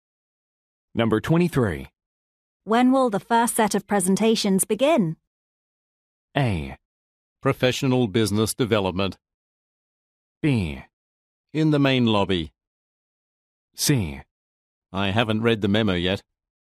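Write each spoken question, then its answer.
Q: When will the first set of presentations begin?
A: C: I haven't read the memo yet.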